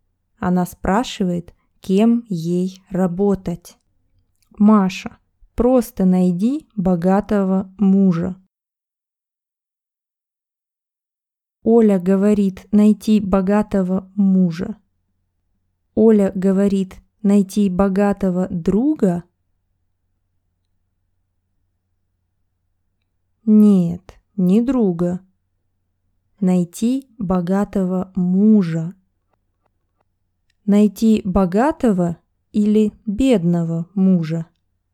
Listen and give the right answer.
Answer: Богатого. Оля говорит, Маша, найди богатого мужа.